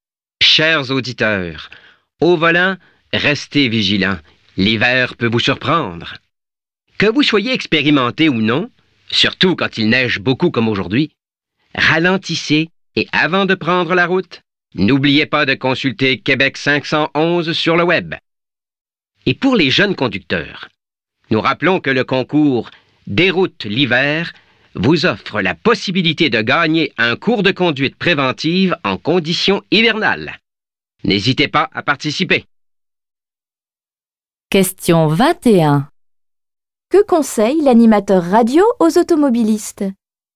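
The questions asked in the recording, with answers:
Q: Que conseille l'animateur radio aux automobilistes?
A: De ralentir et de consulter Québec 511 sur le web avant de prendre la route.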